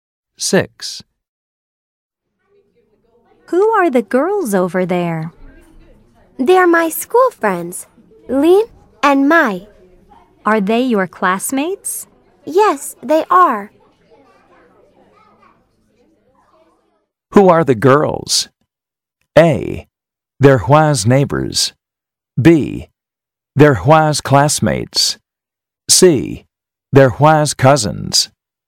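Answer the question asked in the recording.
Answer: B: They're Hua's classmates.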